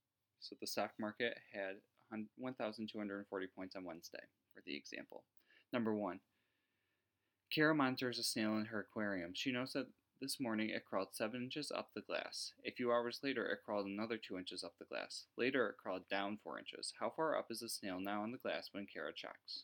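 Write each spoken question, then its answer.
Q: How far up is the snail now on the glass when Kara checks?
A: 5 inches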